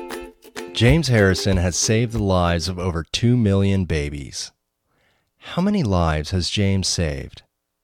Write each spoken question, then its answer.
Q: How many lives has James saved?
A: James has saved the lives of over 2 million babies.